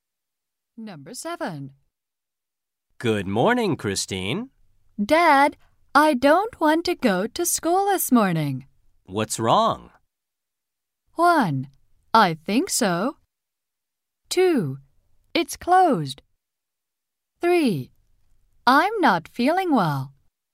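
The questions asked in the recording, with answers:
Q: What's wrong?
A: 3: I'm not feeling well.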